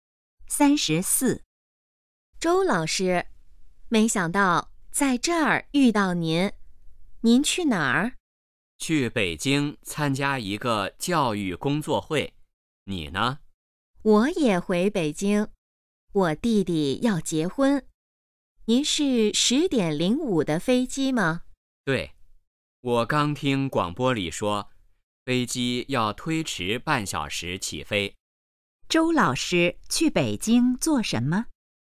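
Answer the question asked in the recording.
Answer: 参加教育工作会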